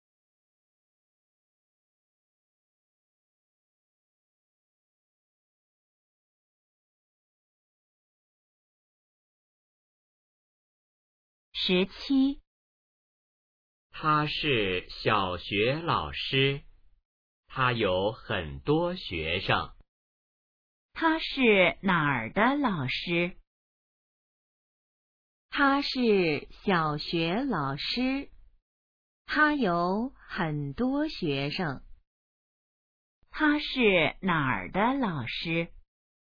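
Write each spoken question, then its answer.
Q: 他是哪儿的老师?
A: 小学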